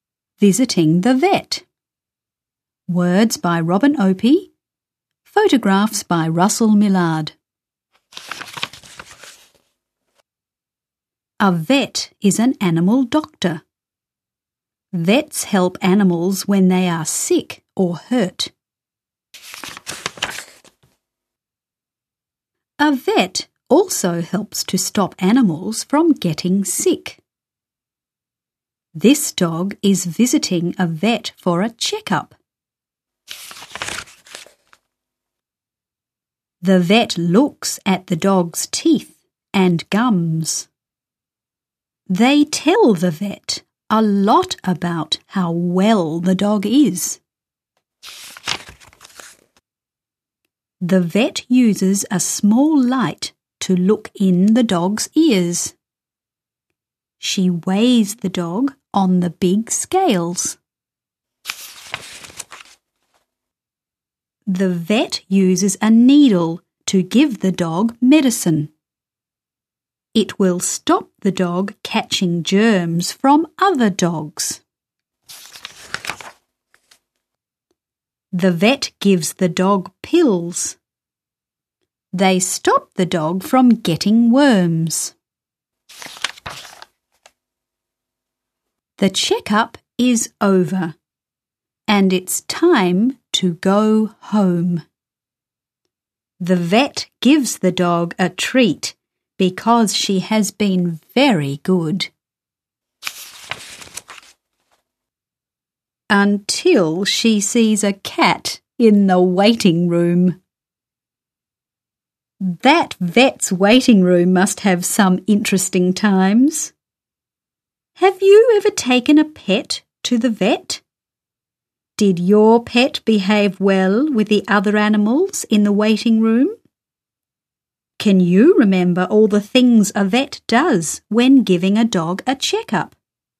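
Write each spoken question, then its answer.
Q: Can you remember all the things a vet does when giving a dog a checkup?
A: Looks at the teeth and gums, looks in the ears with a small light, weighs the dog, gives medicine with a needle, gives pills against worms, and gives a treat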